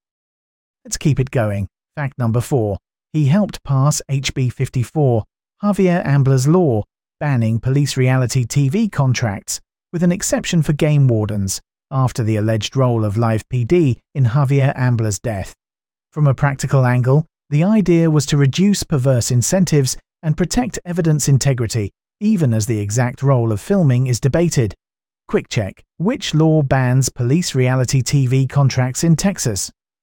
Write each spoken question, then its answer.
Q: which law bans police reality TV contracts in Texas?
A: Correct answer, HB 54.